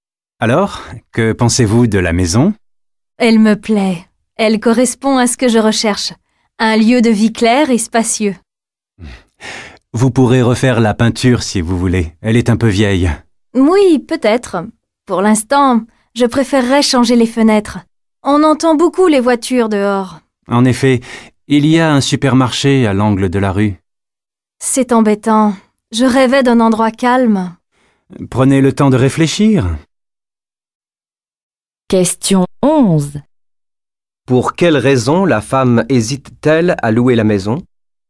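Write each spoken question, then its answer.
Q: Pour quelle raison la femme hésite-t-elle à louer la maison ?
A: Elle est bruyante (on entend beaucoup les voitures, elle rêvait d'un endroit calme)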